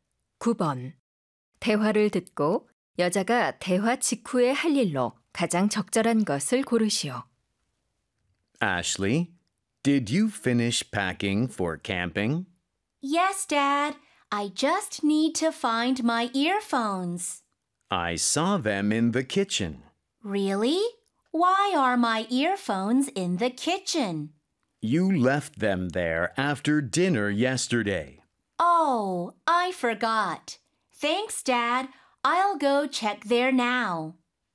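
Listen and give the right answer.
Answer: 부엌에 가서 이어폰 찾아오기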